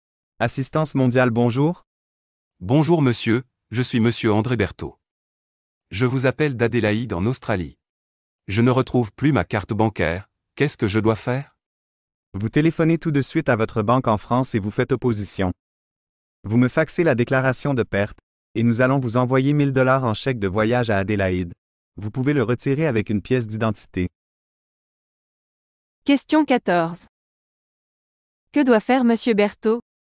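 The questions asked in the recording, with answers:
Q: Que doit faire monsieur Berthaud?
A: Téléphoner tout de suite à sa banque en France pour faire opposition, puis faxer la déclaration de perte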